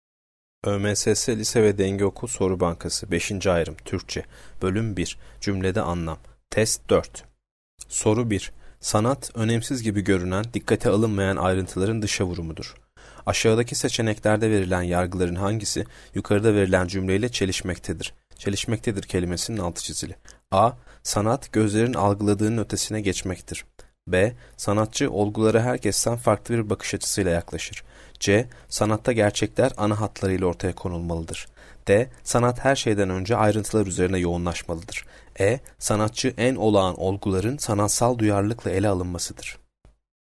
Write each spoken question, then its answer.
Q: Aşağıdaki seçeneklerde verilen yargıların hangisi, yukarıda verilen cümleyle çelişmektedir?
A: Yanıt C. Sanatta gerçekler ana hatlarıyla ortaya konulmalıdır.